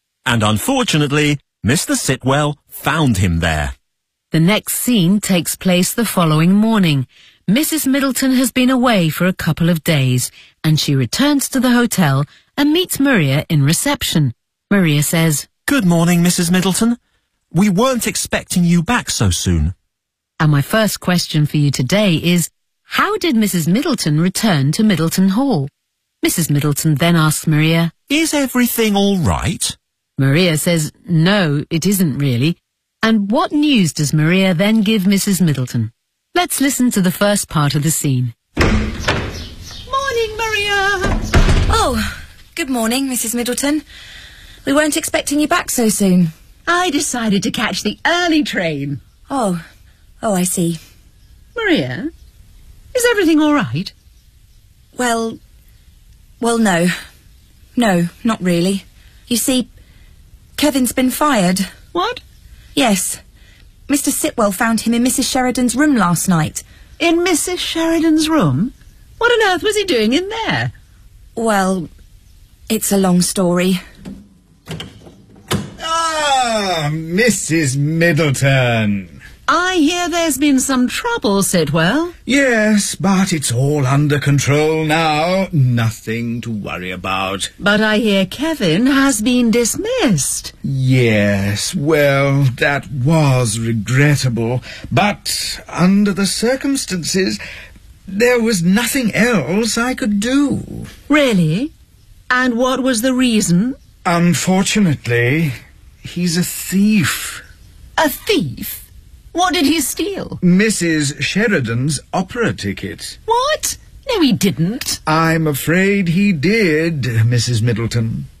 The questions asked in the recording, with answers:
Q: how did Mrs. Middleton return to Middleton Hall?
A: I decided to catch the early train.

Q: And what news does Maria then give Mrs. Middleton?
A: Kevin's been fired.